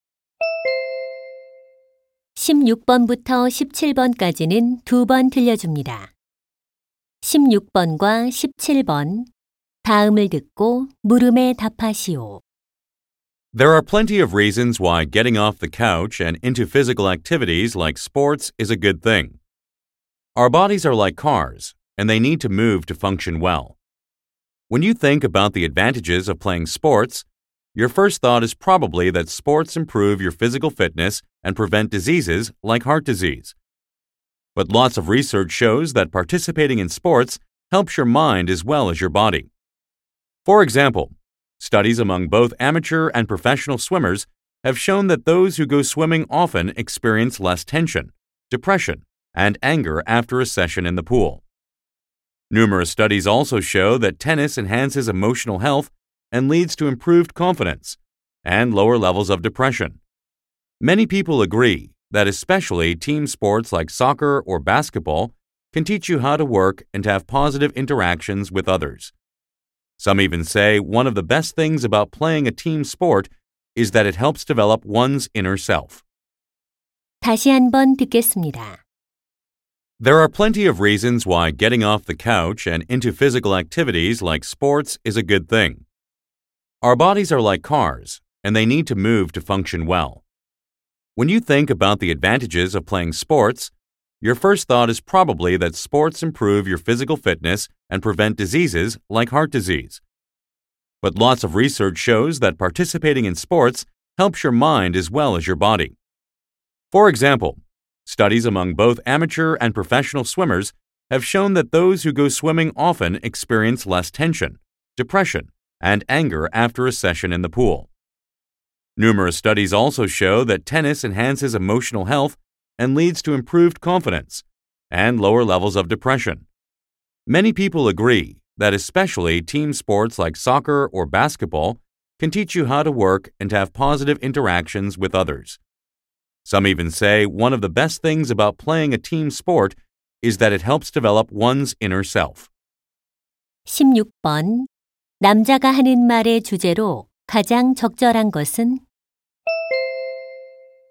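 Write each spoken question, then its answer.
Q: 남자가 하는 말의 주제로 가장 적절한 것은?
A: 스포츠가 정신 건강에 주는 이점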